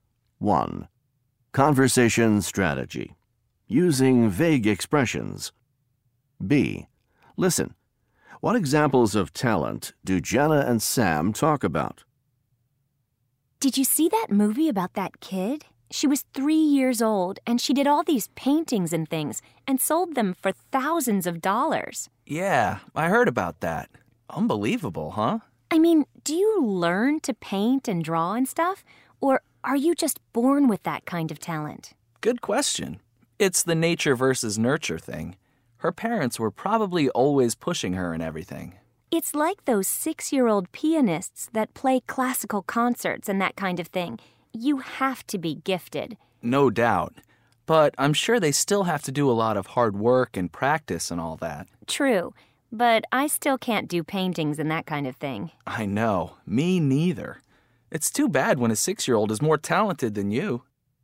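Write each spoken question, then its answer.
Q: What examples of talent do Jenna and Sam talk about?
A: A 3-year-old girl who made paintings and sold them for thousands of dollars, and 6-year-old pianists who play classical concerts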